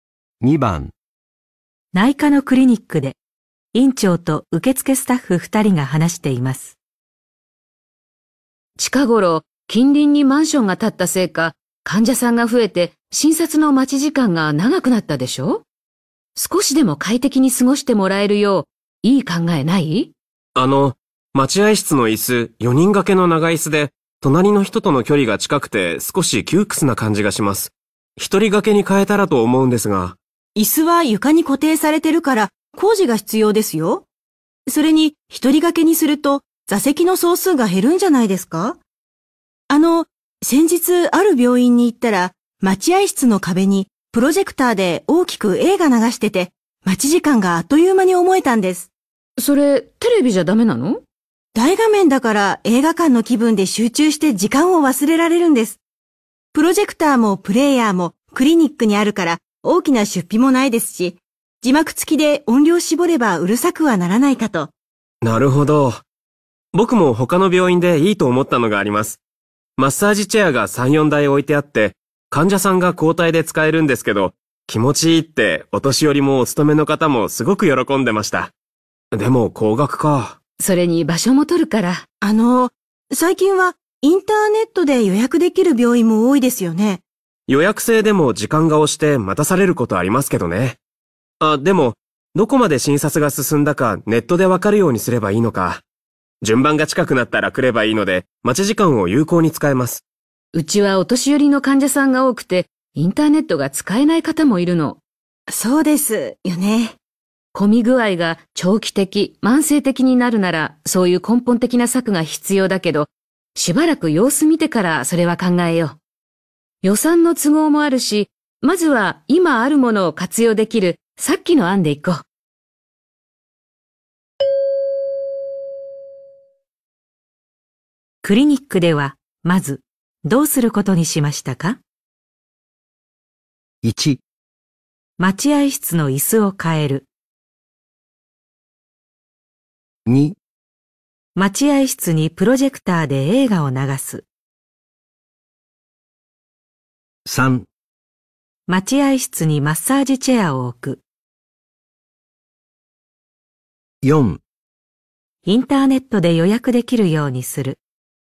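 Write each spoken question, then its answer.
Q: クリニックでは、まず、どうすることにしましたか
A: 2: 待合室にプロジェクターで映画を流す。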